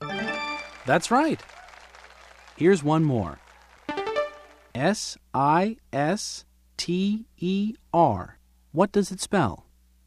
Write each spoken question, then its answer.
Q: S-I-S-T-E-R. What does it spell?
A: Sister. It spells sister.